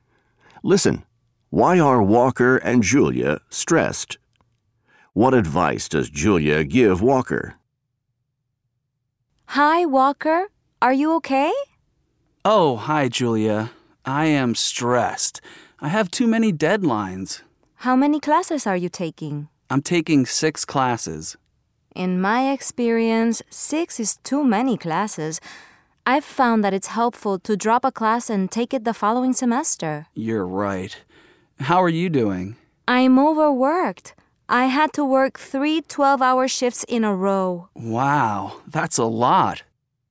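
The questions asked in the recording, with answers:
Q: Why are Walker and Julia stressed?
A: Walker has too many deadlines from taking 6 classes; Julia is overworked after working three 12-hour shifts in a row.

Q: What advice does Julia give Walker?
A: To drop a class and take it the following semester.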